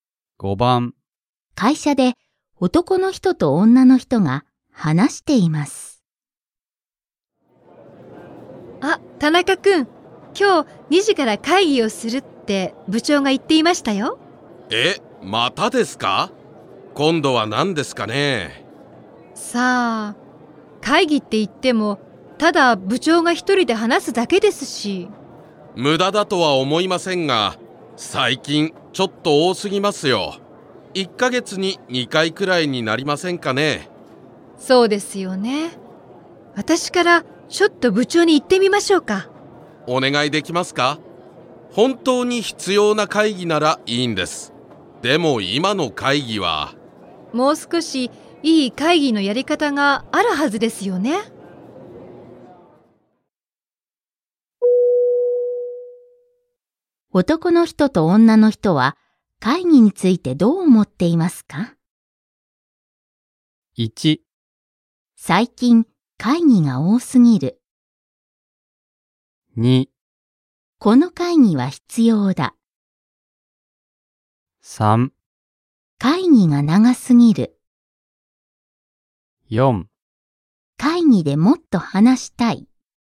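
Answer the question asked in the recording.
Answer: 1: 最近会議が多すぎる。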